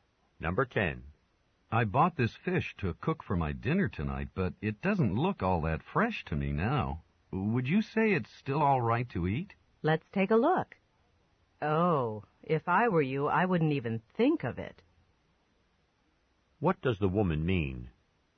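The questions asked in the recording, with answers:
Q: What does the woman mean?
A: He shouldn't eat the fish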